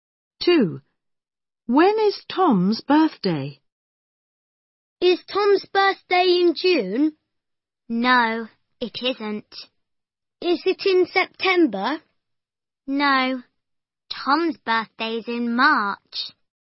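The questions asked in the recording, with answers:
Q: When is Tom's birthday?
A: In March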